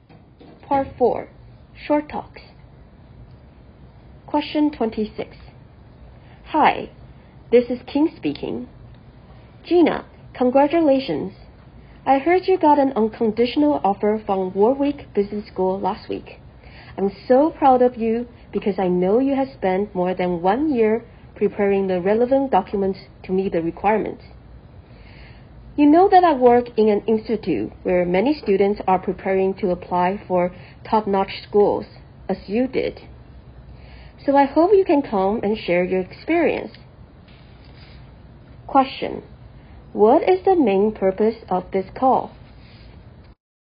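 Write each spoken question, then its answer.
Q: What is the main purpose of this call?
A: To invite Gina to come and share her experience of applying to business school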